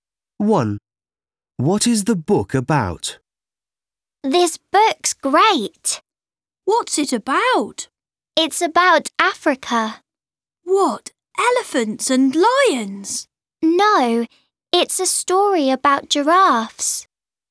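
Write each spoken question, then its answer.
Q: What is the book about?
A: giraffes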